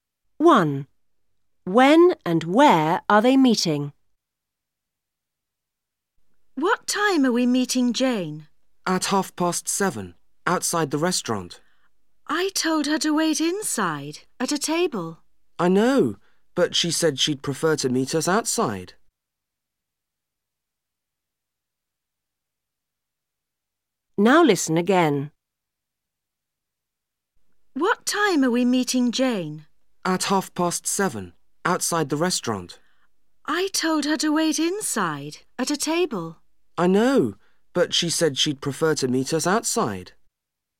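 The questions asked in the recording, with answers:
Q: When and where are they meeting?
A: At 7:30, outside the restaurant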